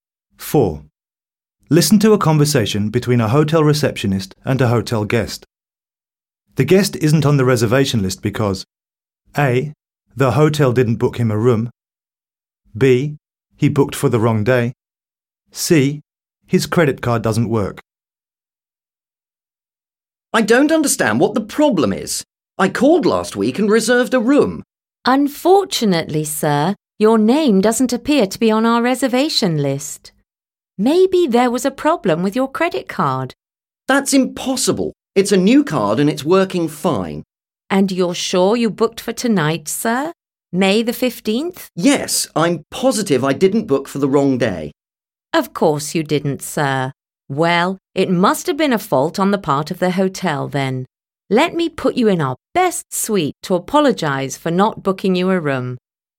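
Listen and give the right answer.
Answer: A: the hotel didn't book him a room.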